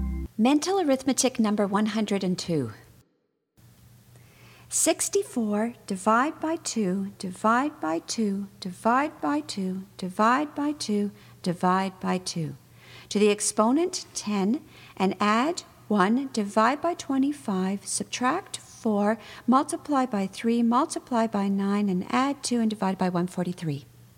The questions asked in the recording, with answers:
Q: 64 divide by 2, divide by 2, divide by 2, divide by 2, divide by 2. To the exponent 10 and add 1, divide by 25, subtract 4, multiply by 3, multiply by 9, and add 2 and divide by 143.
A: And the answer is 7.